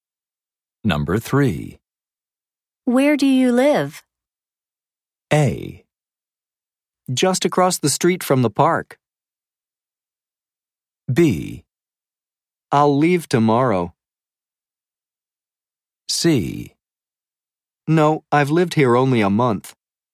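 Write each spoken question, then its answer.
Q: Where do you live?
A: A: Just across the street from the park.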